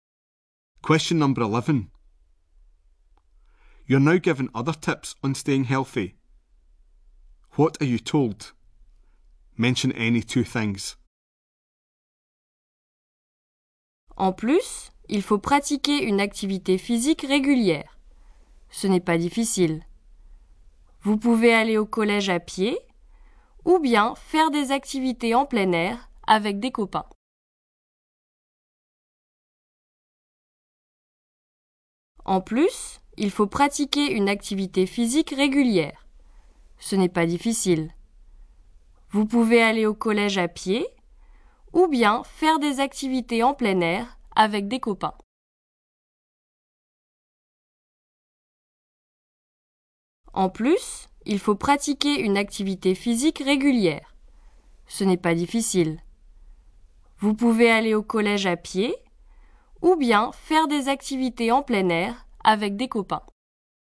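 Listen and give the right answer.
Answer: Do regular physical activity; walk to school; do outdoor activities with friends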